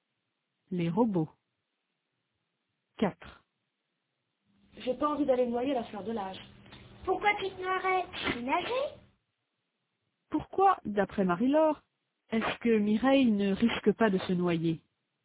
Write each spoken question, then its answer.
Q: Pourquoi, d'après Marie-Laure, est-ce que Mireille ne risque pas de se noyer?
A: Parce qu'elle sait nager.